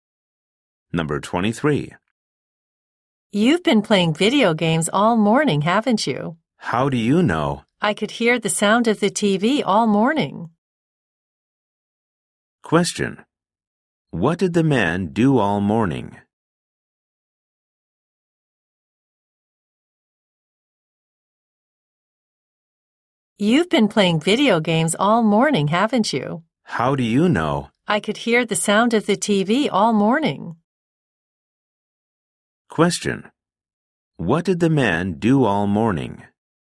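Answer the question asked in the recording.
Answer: He played video games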